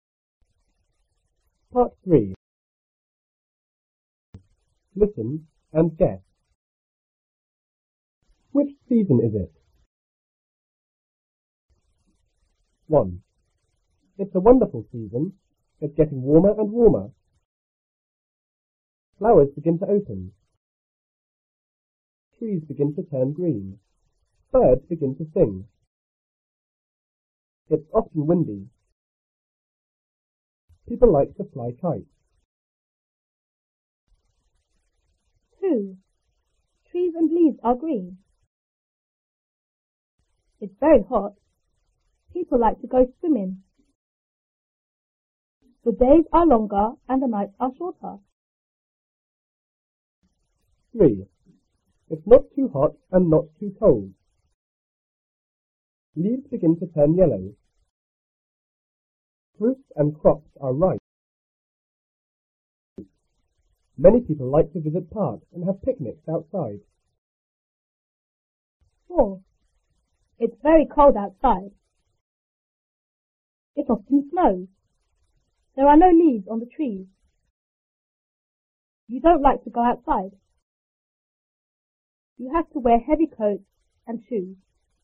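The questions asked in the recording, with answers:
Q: Which season is it?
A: Spring

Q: Which season is it?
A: Summer

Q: Which season is it?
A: Autumn

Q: Which season is it?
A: Winter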